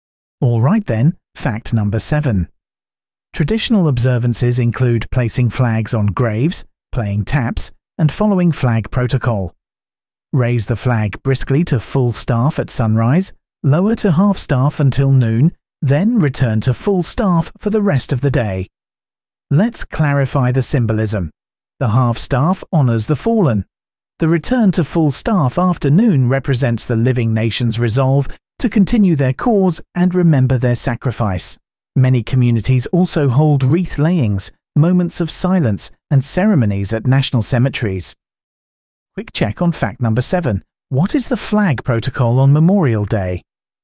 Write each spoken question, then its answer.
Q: What is the flag protocol on Memorial Day?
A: Half staff until noon, then full staff.